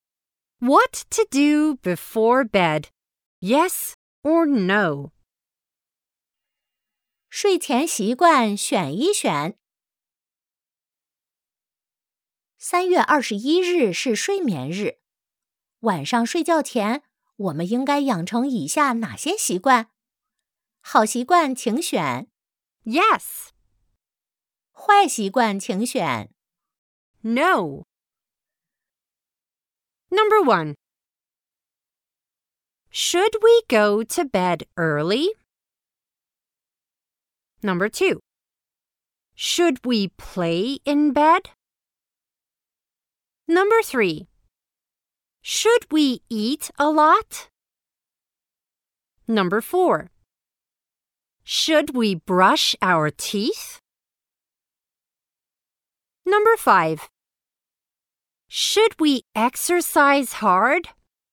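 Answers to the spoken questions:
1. Yes
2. No
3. No
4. Yes
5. No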